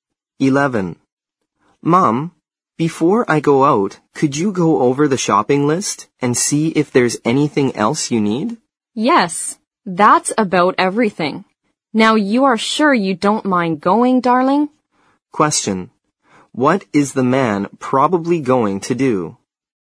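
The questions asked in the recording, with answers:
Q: What is the man probably going to do?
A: Go shopping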